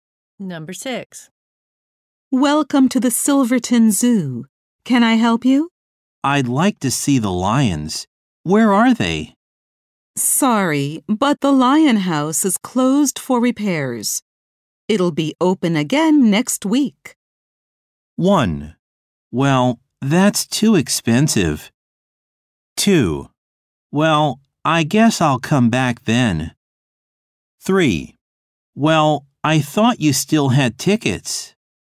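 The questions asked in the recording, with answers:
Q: It'll be open again next week.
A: 2: Well, I guess I'll come back then.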